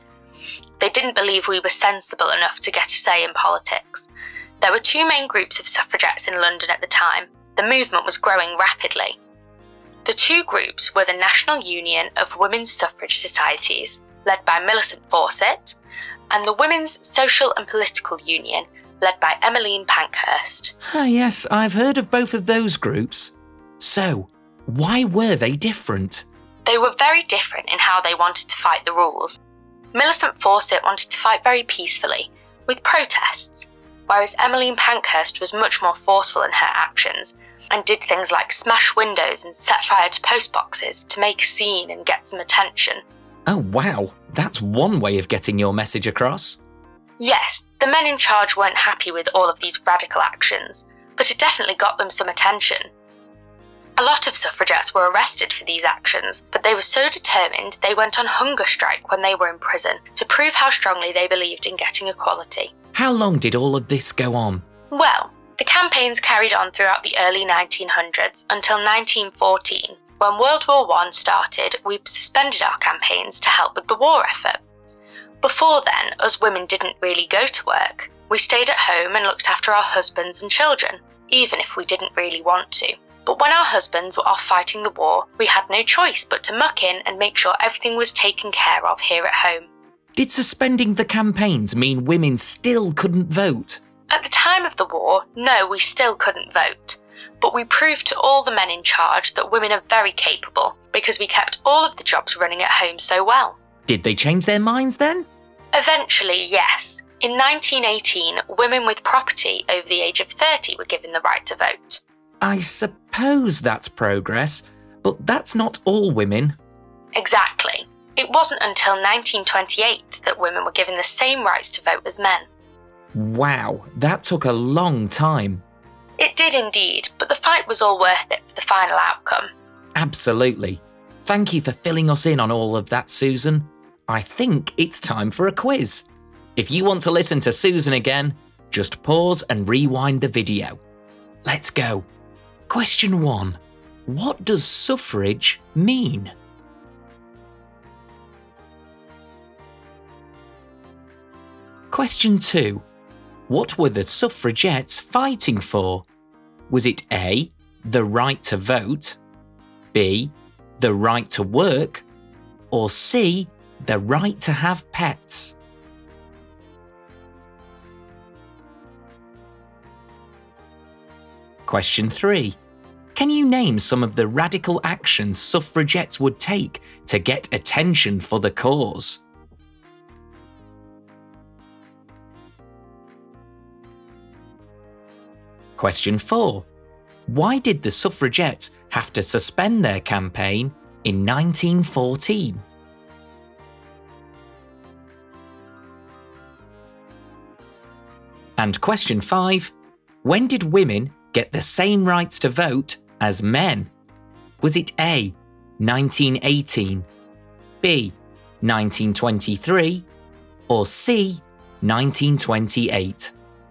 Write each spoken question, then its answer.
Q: what were the suffragettes fighting for?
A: Well, it's A, of course.

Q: Can you name some of the radical actions suffragettes would take to get attention for the cause?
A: setting fire to post boxes, smashing windows, and going on hunger strikes.

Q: Why did the suffragettes have to suspend their campaign in 1914?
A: Well, that was because of World War One.

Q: When did women get the same rights to vote as men?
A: The answer is C, 1928.